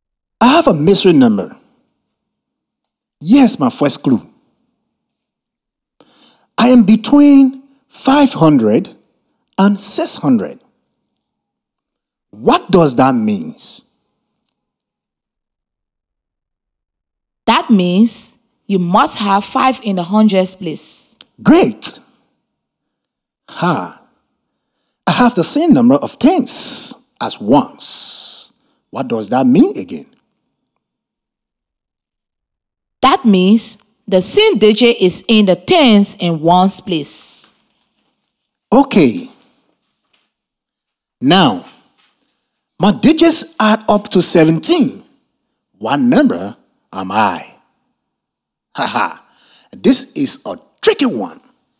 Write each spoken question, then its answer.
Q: What number am I?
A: The number has to be 566.